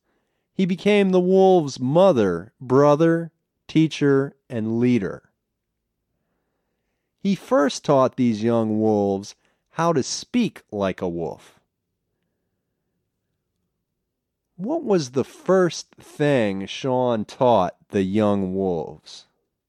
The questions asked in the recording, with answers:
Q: What was the first thing Sean taught the young wolves?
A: Sean first taught the young wolves to speak like a wolf.